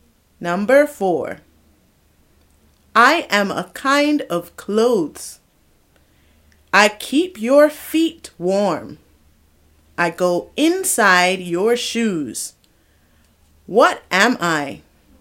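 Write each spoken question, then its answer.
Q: What am I?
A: socks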